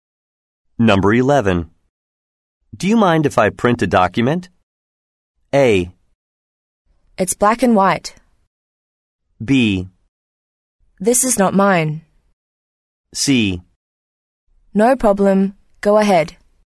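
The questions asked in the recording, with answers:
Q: Do you mind if I print a document?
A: C: No problem. Go ahead.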